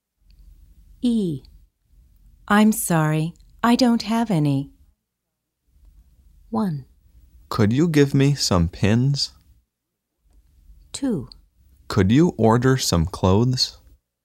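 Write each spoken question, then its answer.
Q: I'm sorry, I don't have any.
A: 1: Could you give me some pins?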